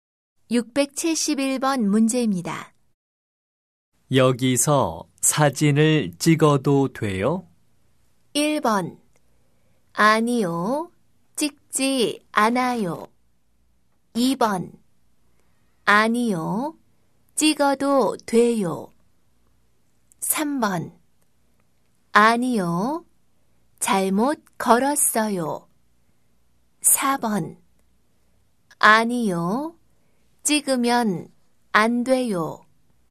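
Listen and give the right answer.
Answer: 4: 아니요, 찍으면 안 돼요.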